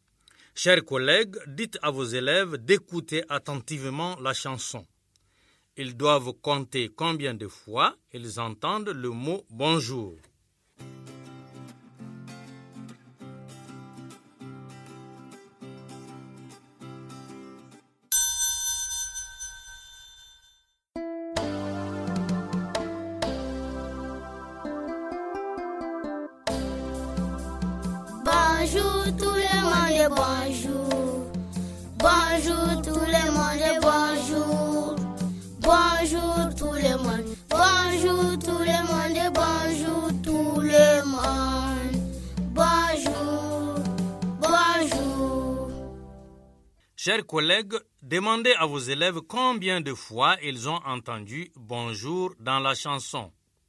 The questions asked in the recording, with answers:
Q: Chers collègues, demandez à vos élèves combien de fois ils ont entendu « Bonjour » dans la chanson.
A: Le mot « bonjour » est chanté 9 fois dans la chanson.